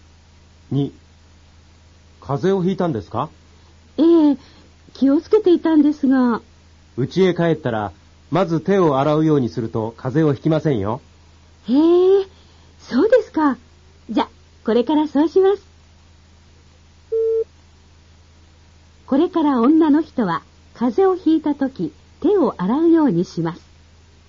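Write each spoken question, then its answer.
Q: これから女の人は風邪をひいたとき手を洗うようにします。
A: 正しくない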